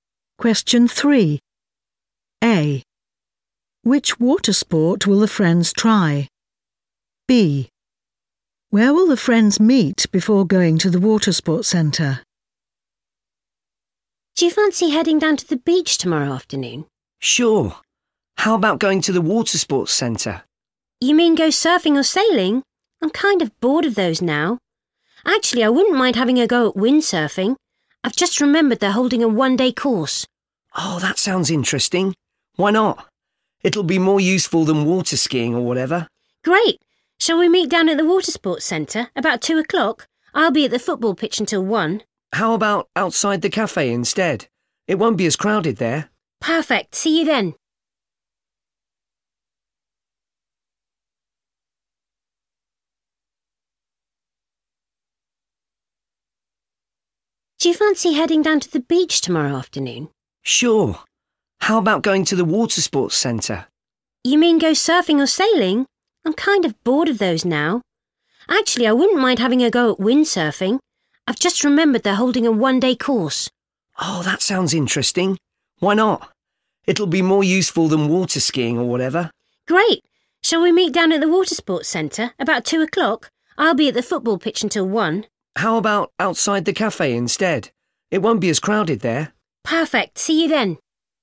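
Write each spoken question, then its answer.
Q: Which water sport will the friends try?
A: windsurfing

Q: Where will the friends meet before going to the water sports centre?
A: outside the cafe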